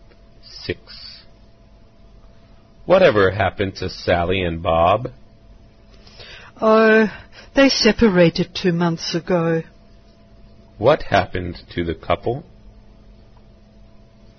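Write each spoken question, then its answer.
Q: What happened to the couple?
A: They separated two months ago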